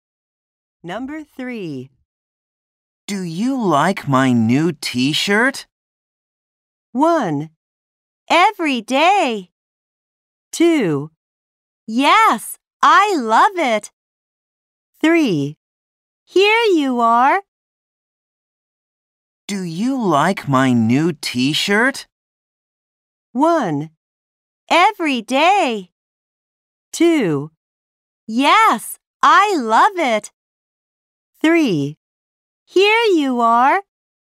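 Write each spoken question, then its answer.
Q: Do you like my new t-shirt?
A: 2: Yes, I love it.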